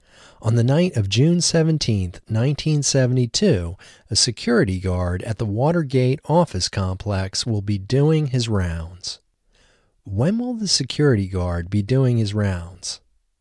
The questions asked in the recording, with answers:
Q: When will the security guard be doing his rounds?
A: The security guard will be doing his rounds on the night of June 17, 1972.